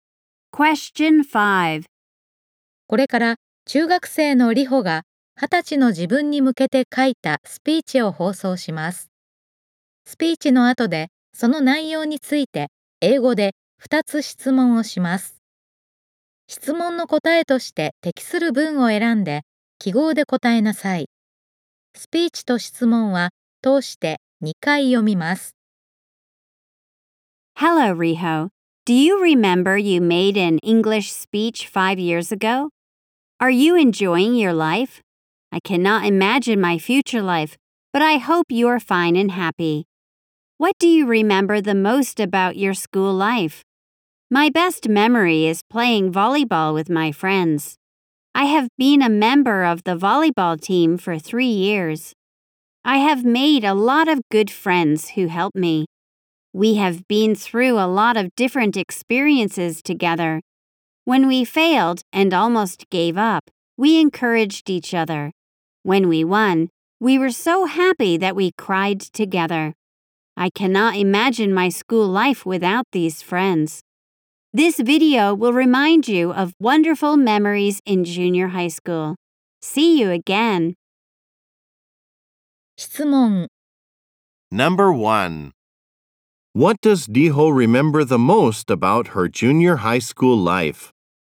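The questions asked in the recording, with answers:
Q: What does Riho remember the most about her junior high school life?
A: Playing volleyball with her friends.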